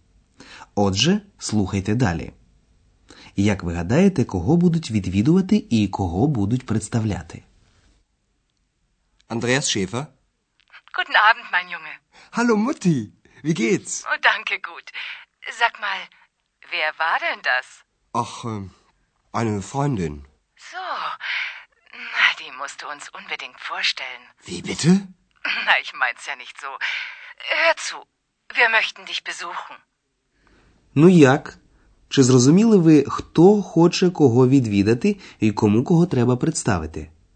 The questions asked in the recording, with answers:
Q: Як ви гадаєте, кого будуть відвідувати і кого будуть представляти?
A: Отже, мати Андреаса хоче його відвідати, і ще вона хоче, щоб Андреас представив їй екс.